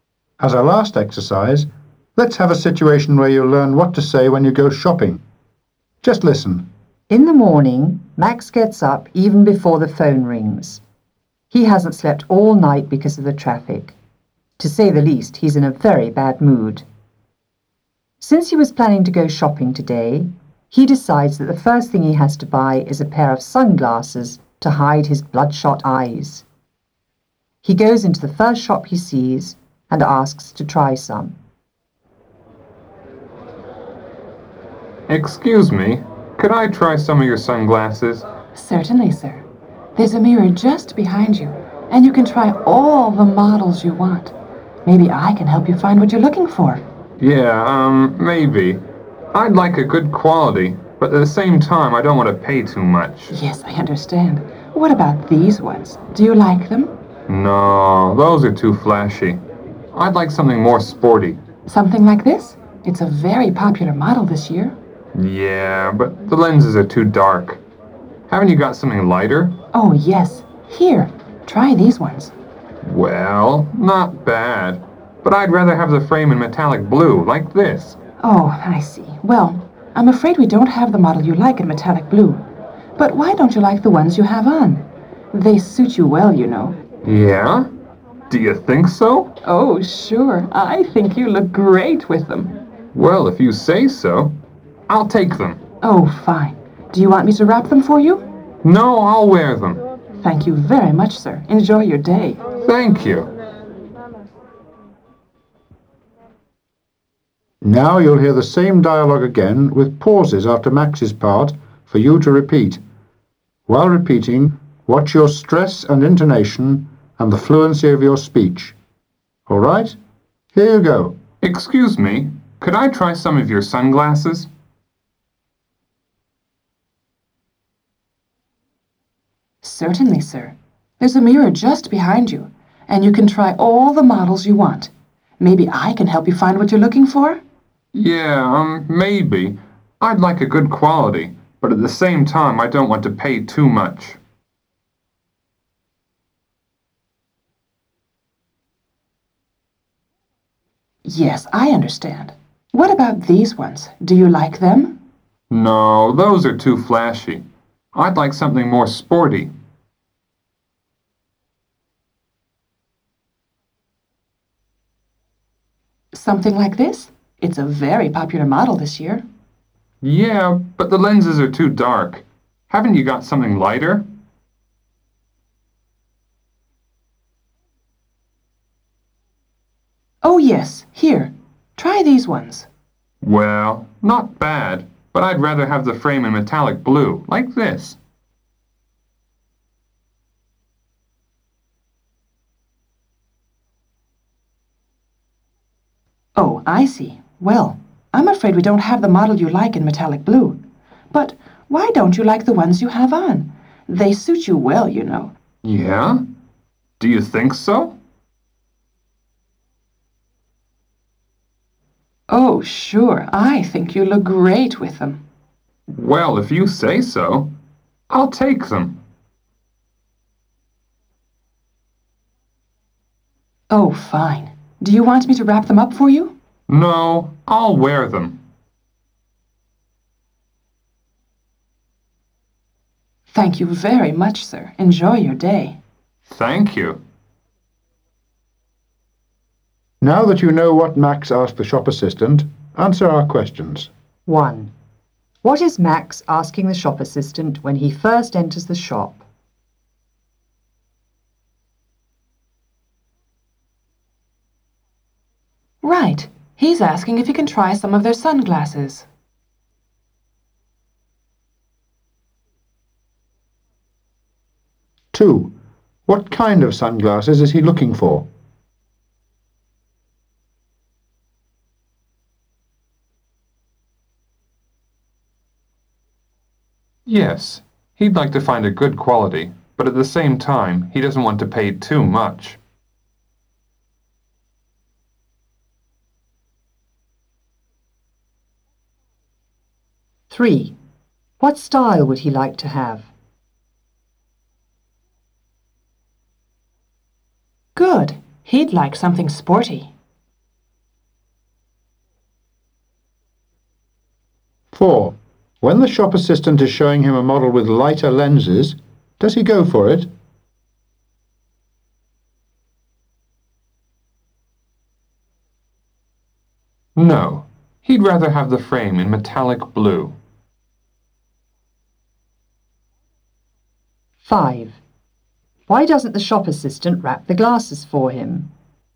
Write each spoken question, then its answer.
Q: What is Max asking the shop assistant when he first enters the shop?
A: He's asking if he can try some of their sunglasses.

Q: What kind of sunglasses is he looking for?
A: he'd like to find a good quality, but at the same time, he doesn't want to pay too much.

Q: What style would he like to have?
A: He'd like something sporty.

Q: Why doesn't the shop assistant wrap the glasses for him?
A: because he's going to wear them.